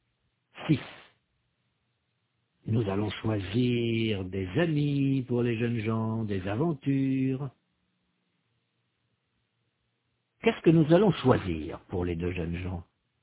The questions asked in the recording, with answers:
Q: Qu'est-ce que nous allons choisir pour les deux jeunes gens?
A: Des amis, des aventures, des voyages.